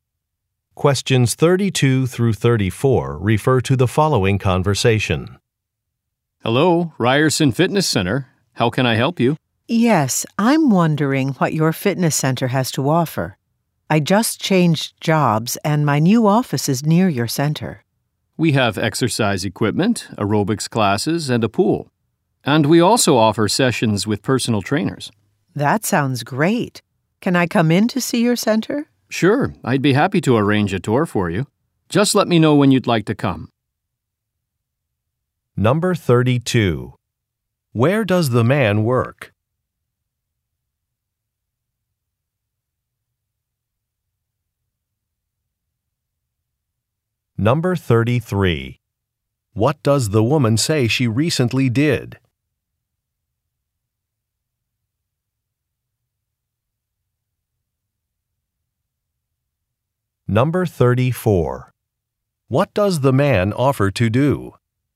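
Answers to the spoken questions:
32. At a fitness center
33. She changed jobs
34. Arrange a tour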